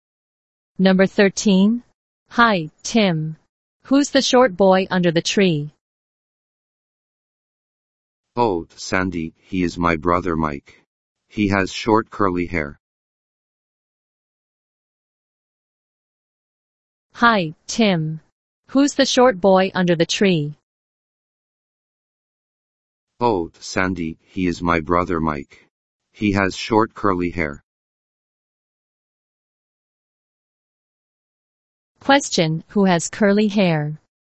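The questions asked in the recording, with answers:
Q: Question, who has curly hair?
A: Mike, Tim's brother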